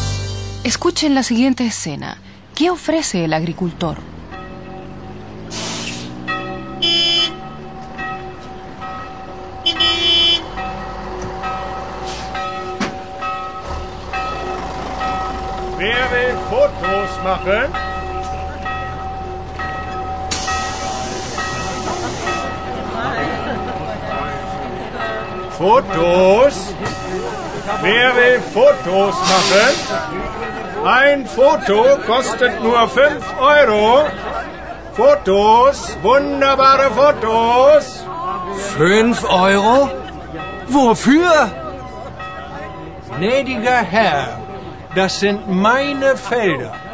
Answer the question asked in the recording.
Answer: Nuestro agricultor solo ofrece la posibilidad de que los turistas fotografíen.